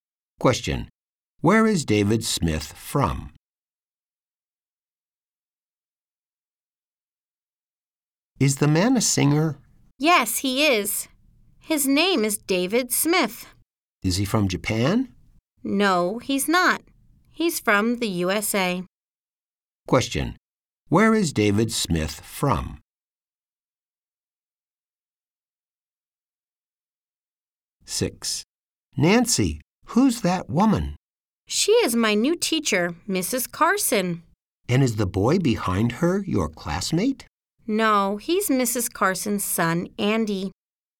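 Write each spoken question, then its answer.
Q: Where is David Smith from?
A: The USA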